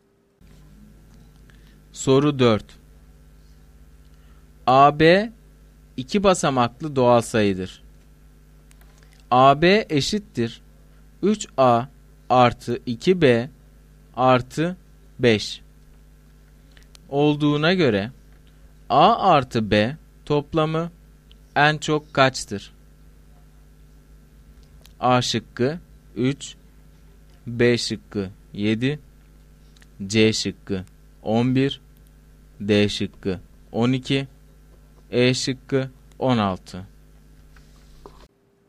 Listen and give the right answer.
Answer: Doğru cevap C şıkkı.